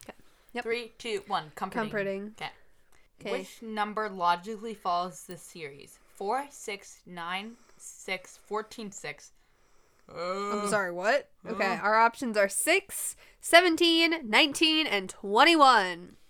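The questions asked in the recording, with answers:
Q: Which number logically follows this series?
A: 19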